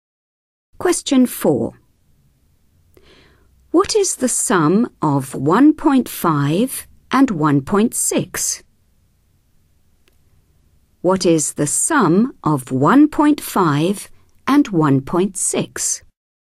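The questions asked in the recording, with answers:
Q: What is the sum of 1.5 and 1.6?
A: 3.1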